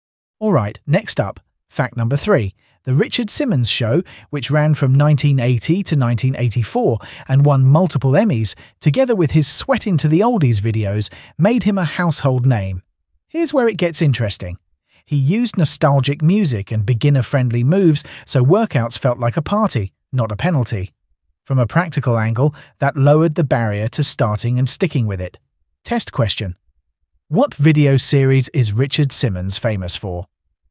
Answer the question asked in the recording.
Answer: Correct answer, Sweating to the Oldies.